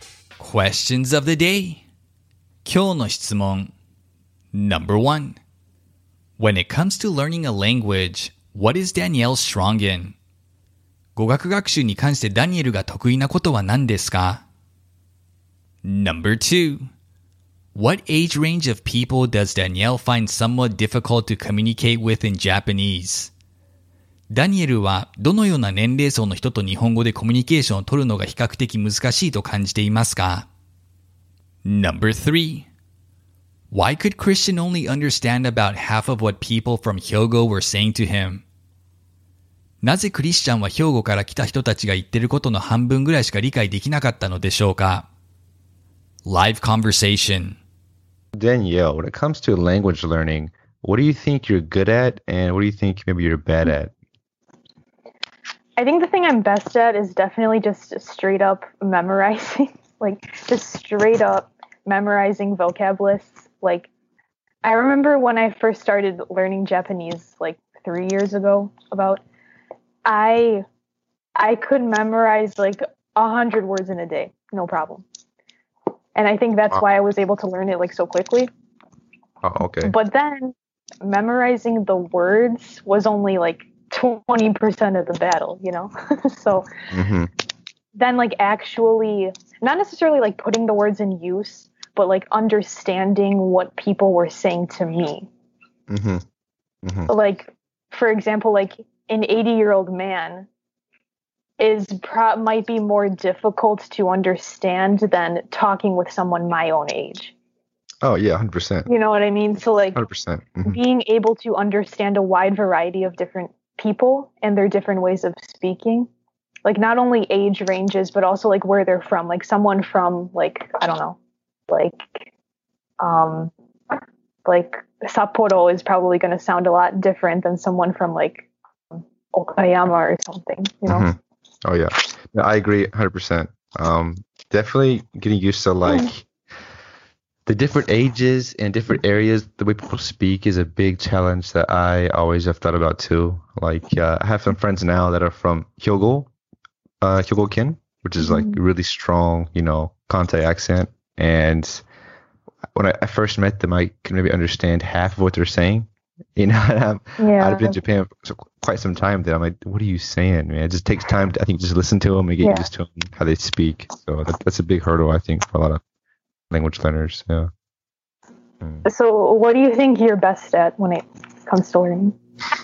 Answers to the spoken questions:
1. She is strong in memorizing vocabulary.
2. Danielle feels older Japanese in their 80s, for example, are more challenging to speak with than people her age.
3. They speak in an accent he was unfamiliar with.